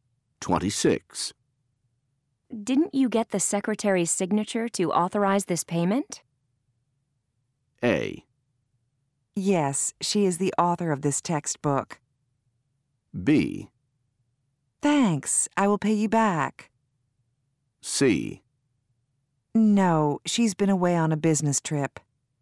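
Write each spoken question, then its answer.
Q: Didn't you get the secretary's signature to authorize this payment?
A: C: No, she's been away on a business trip.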